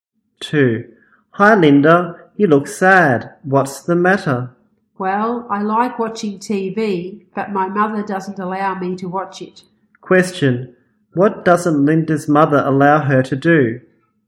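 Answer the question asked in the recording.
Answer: Watch TV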